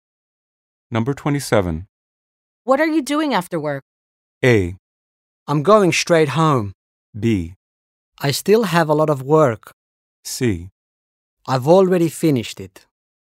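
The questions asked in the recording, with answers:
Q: What are you doing after work?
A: A: I'm going straight home.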